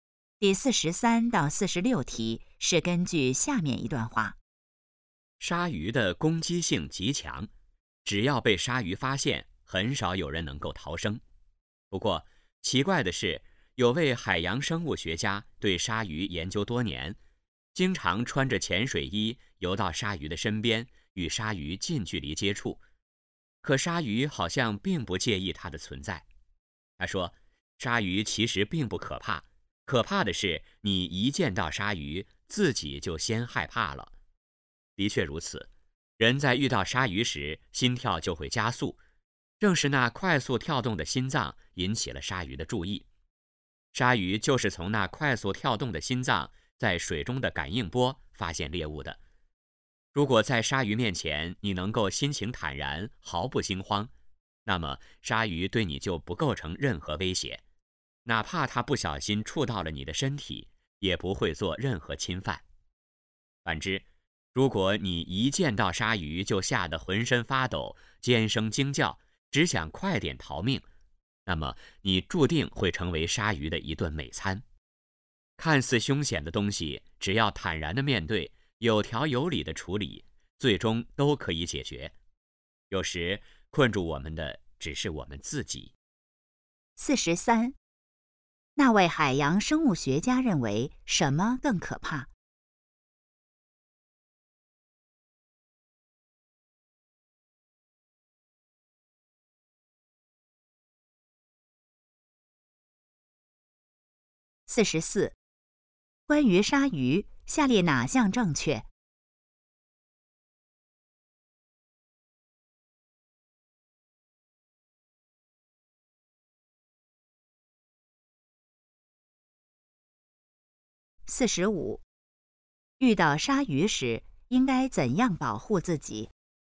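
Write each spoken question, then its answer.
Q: 那位海洋生物学家认为什么更可怕?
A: 见到鲨鱼自己先害怕

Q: 遇到鲨鱼时应该怎样保护自己?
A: 心情坦然,毫不惊慌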